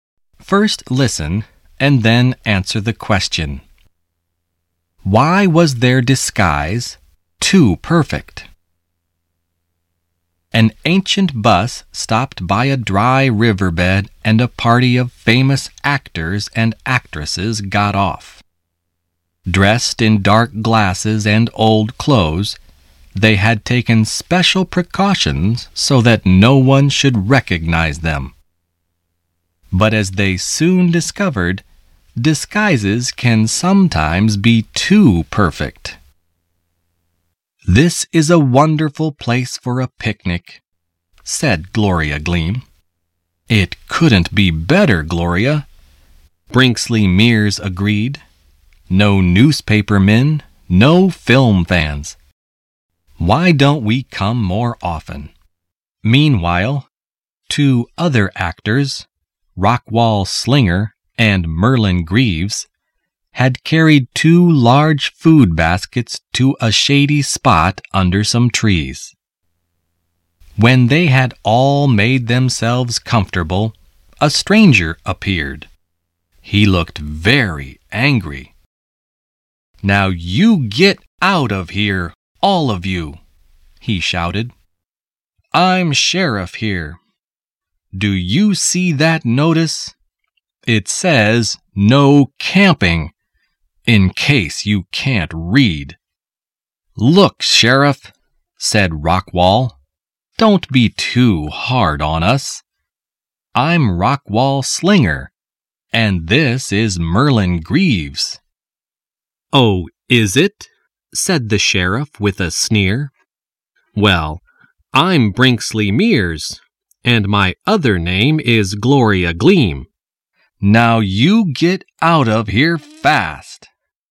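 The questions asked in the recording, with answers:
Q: Why was their disguise too perfect?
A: The sheriff did not recognize them and did not believe they were famous actors.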